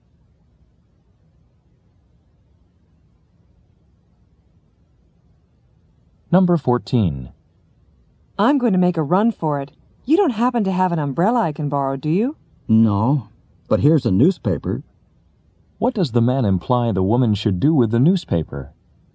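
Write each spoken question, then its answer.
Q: What does the man imply the woman should do with the newspaper?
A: Use it to cover her head from the rain.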